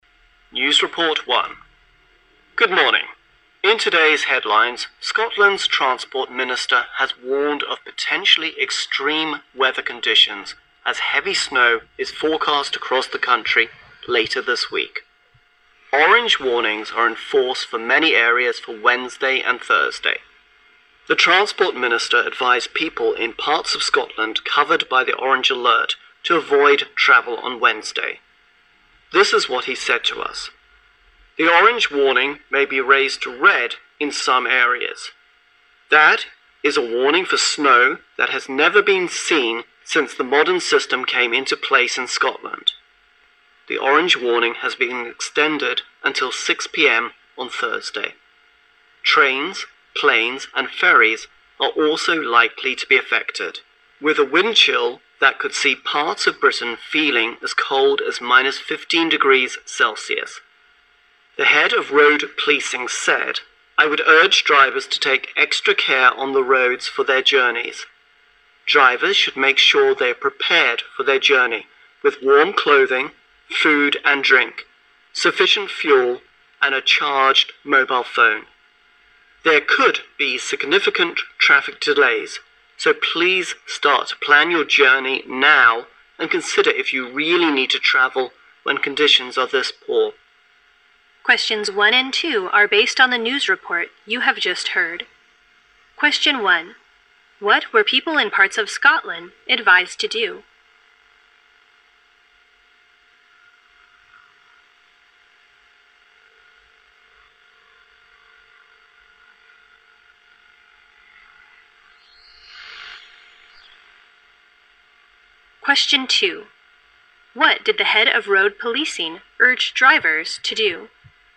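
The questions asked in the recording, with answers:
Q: What were people in parts of Scotland advised to do?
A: Avoid travel on Wednesday

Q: What did the head of road policing urge drivers to do?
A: Take extra care on the roads for their journeys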